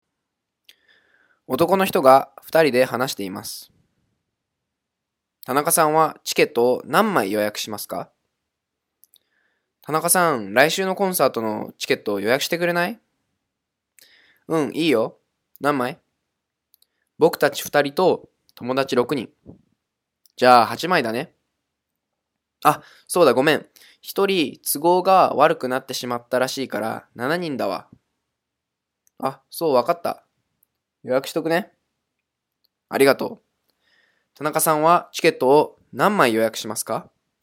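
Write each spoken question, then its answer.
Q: 田中さんはチケットを何枚予約しますか?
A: 7枚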